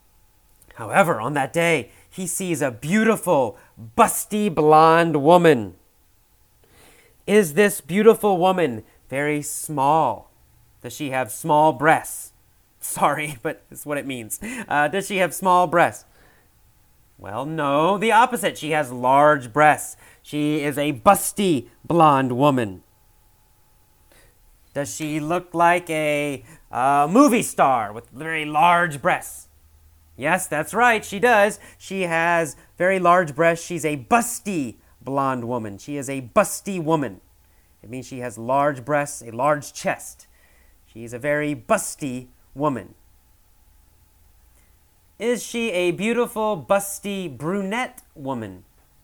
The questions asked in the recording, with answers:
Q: Is she a beautiful, busty brunette woman?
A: No, she's not a beautiful, busty brunette woman.